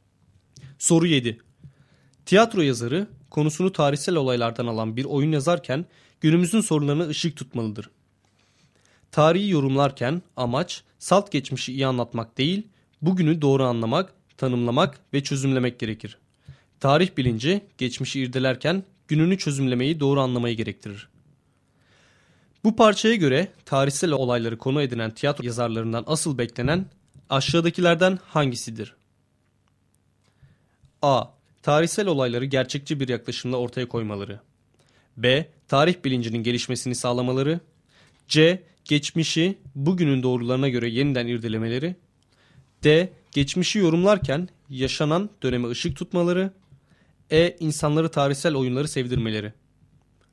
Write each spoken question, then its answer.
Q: Bu parçaya göre tarihsel olayları konu edinen tiyatro yazarlarından asıl beklenen aşağıdakilerden hangisidir?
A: Doğru cevap D şıkkı.